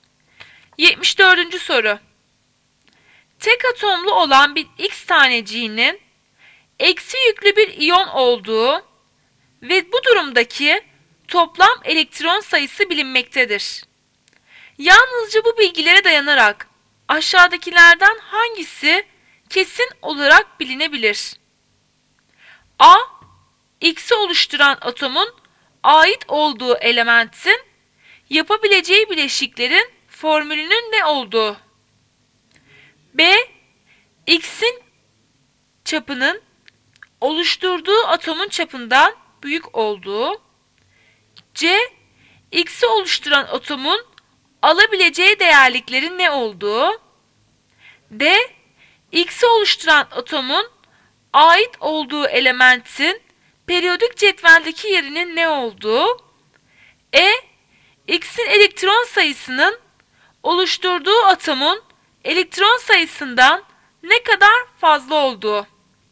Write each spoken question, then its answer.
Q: Yalnızca bu bilgilere dayanarak aşağıdakilerden hangisi kesin olarak bilinebilir?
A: Cevap B. X'in çapının oluşturduğu atomun çapından büyük olduğu.